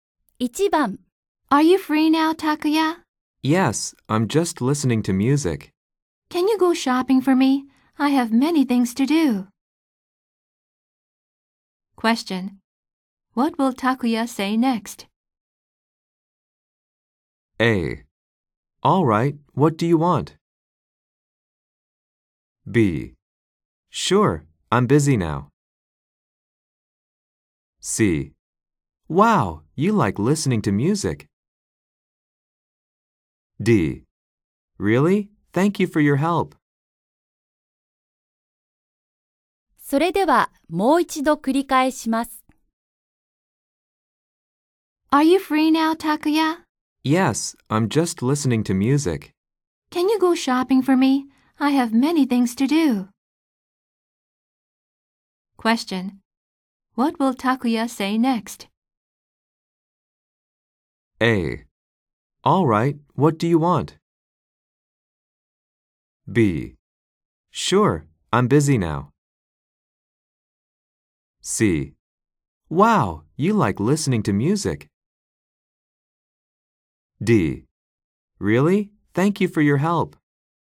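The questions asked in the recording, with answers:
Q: What will Takuya say next?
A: A: All right, what do you want?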